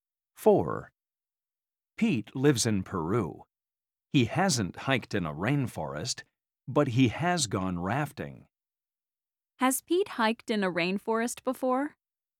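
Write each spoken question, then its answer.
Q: Has Pete hiked in a rainforest before?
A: No, he hasn't.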